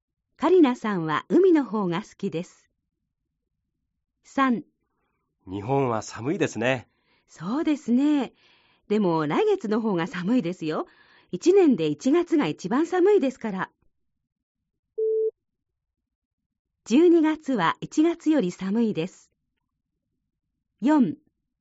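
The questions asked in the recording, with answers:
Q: 12月は1月より寒いです。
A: ×(1月が一番寒い)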